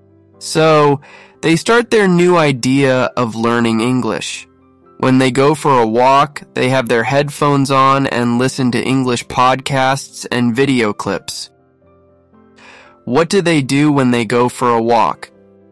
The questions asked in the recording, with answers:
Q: What do they do when they go for a walk?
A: They have their headphones on and listen to English podcasts and video clips.